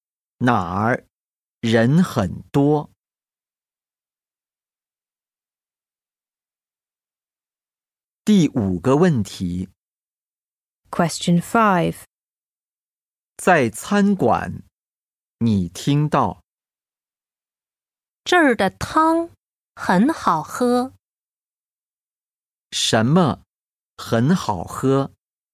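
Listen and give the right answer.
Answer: 这儿的汤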